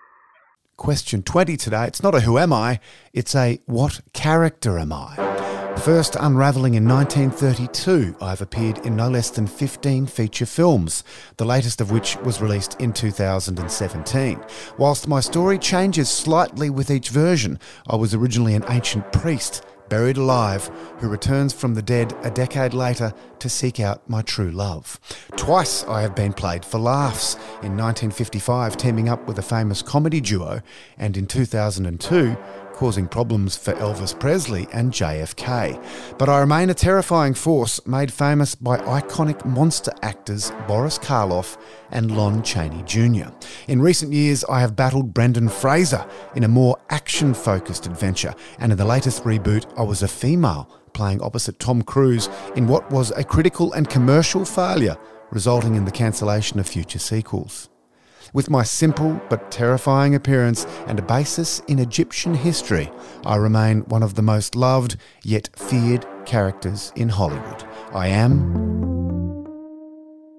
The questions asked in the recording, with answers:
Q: It's not a who am I, it's a what character am I?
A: I am the Mummy.